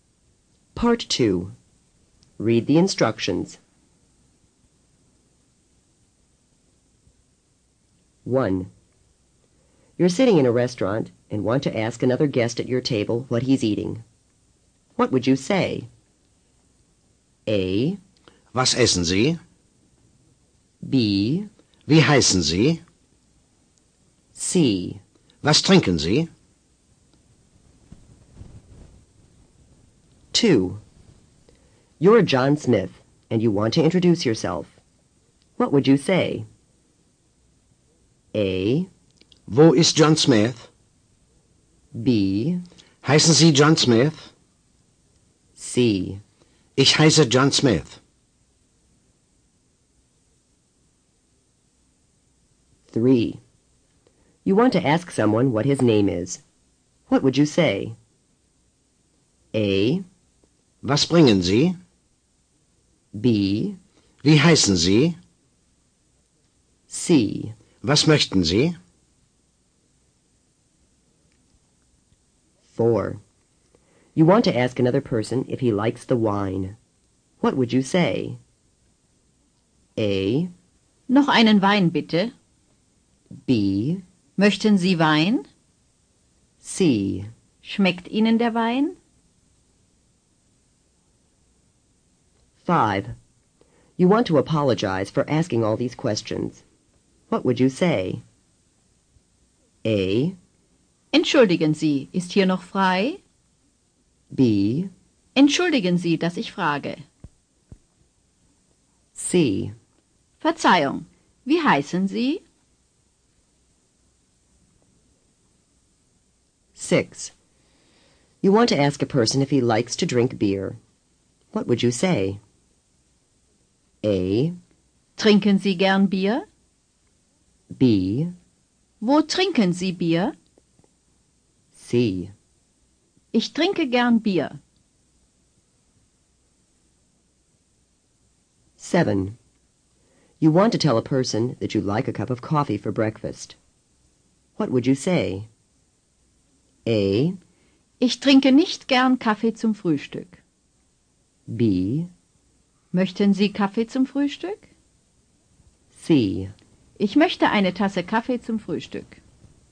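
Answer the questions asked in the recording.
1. A: Was essen Sie?
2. C: Ich heiße John Smith.
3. B: Wie heißen Sie?
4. C: Schmeckt Ihnen der Wein?
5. B: Entschuldigen Sie, dass ich frage.
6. A: Trinken Sie gern Bier?
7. C: Ich möchte eine Tasse Kaffee zum Frühstück.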